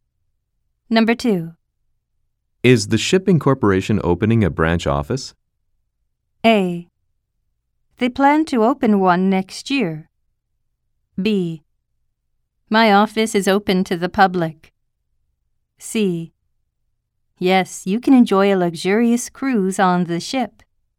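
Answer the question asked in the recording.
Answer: A: They plan to open one next year.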